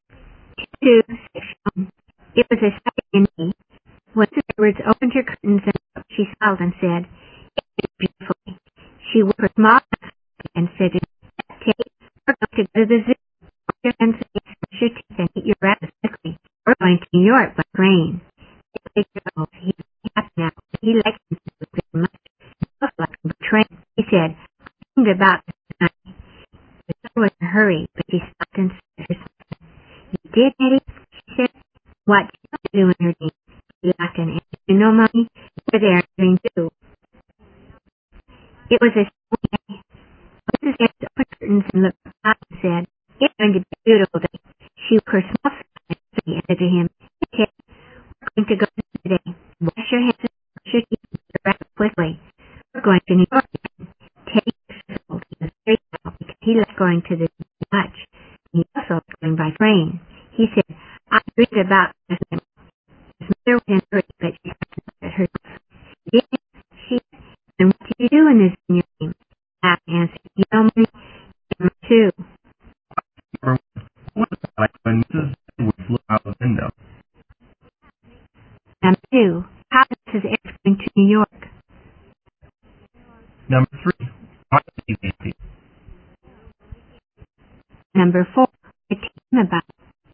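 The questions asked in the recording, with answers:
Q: What was it like when Mrs. Edwards looked out the window?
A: It was sunny.

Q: how is Mrs. Edwards going to New York?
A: By train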